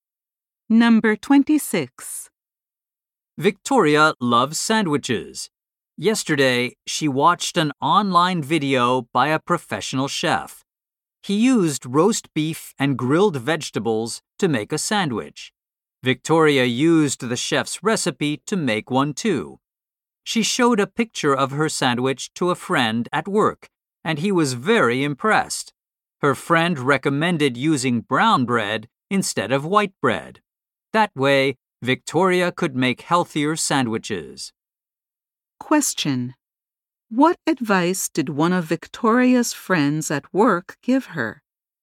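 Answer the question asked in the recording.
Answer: To use brown bread instead of white bread.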